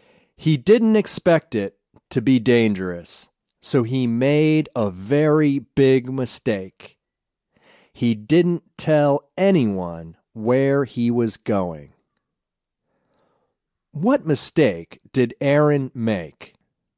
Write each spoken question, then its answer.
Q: What mistake did Aaron make?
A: He didn't tell anyone where he was going.